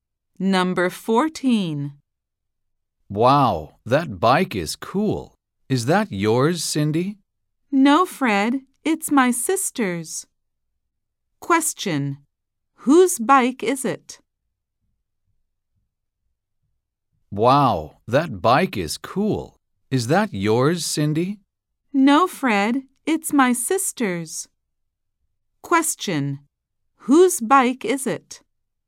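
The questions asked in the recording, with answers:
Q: Whose bike is it?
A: Cindy's sister's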